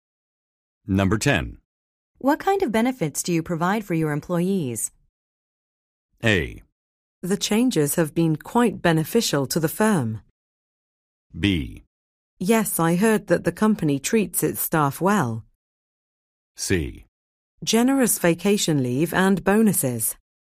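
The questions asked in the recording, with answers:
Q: What kind of benefits do you provide for your employees?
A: C: Generous vacation leave and bonuses.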